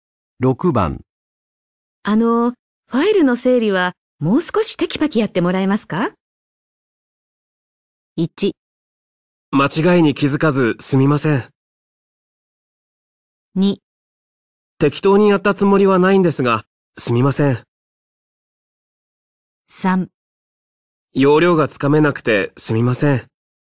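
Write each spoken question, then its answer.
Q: あの、ファイルの整理はもう少しテキパキやってもらえますか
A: 3: 要領がつかめなくてすみません。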